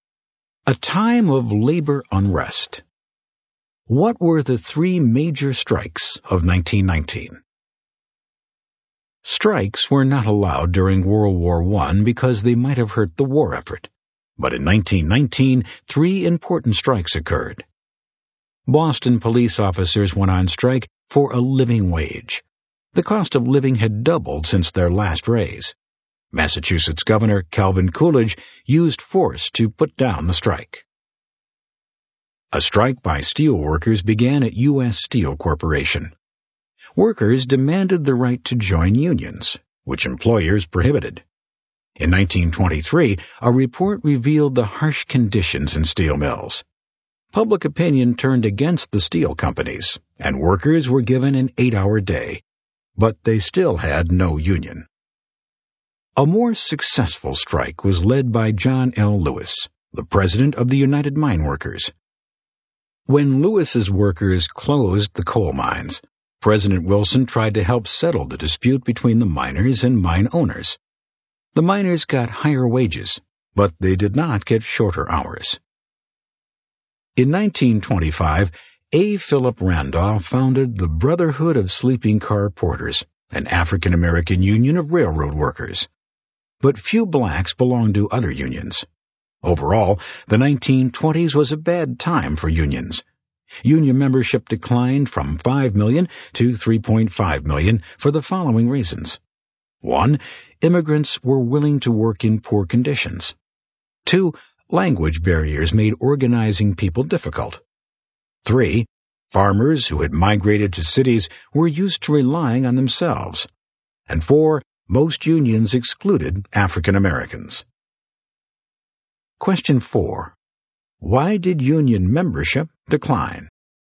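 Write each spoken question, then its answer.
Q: Why did union membership decline?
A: Immigrants were willing to work in poor conditions, language barriers, farmers who moved to cities were used to relying on themselves, and most unions excluded African Americans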